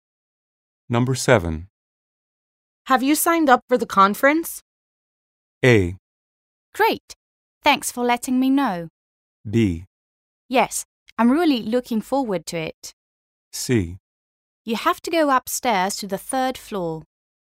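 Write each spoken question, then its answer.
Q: Have you signed up for the conference?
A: B: Yes, I'm really looking forward to it.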